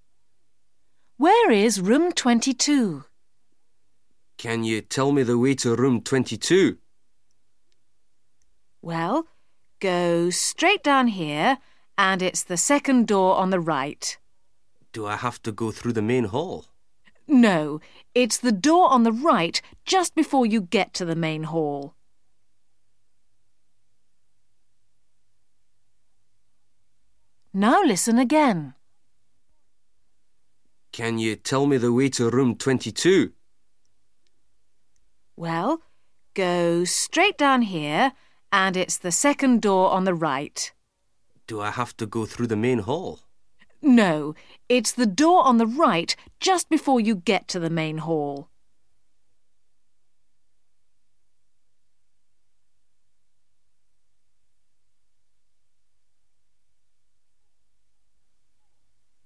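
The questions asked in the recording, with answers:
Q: Where is room 22?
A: The second door on the right, just before the main hall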